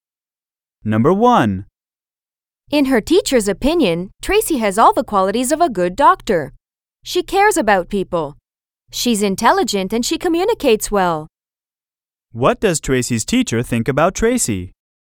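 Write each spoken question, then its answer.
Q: What does Tracy's teacher think about Tracy?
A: She thinks Tracy has all the qualities of a good doctor.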